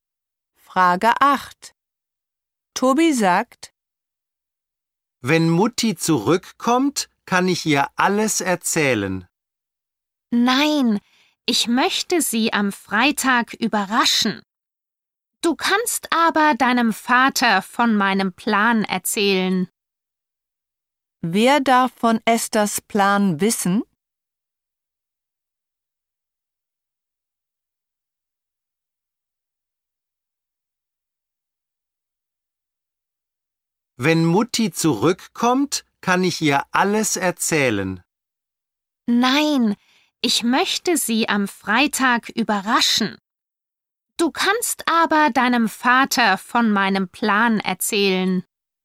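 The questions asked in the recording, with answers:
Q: Wer darf von Esthers Plan wissen?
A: Tobis Vater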